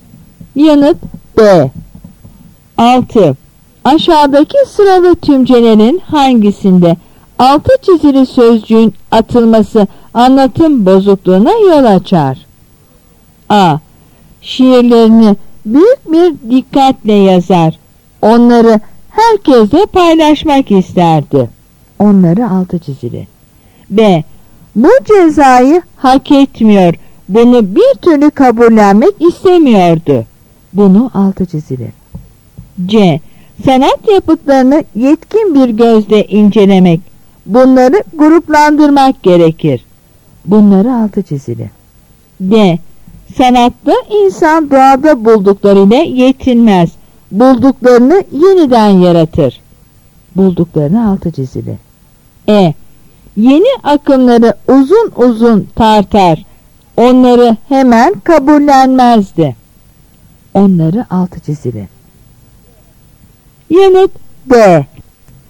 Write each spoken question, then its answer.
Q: Aşağıdaki sıralı tümcelerin hangisinde altı çizili sözcüğün atılması anlatım bozukluğuna yol açar?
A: Yanıt D.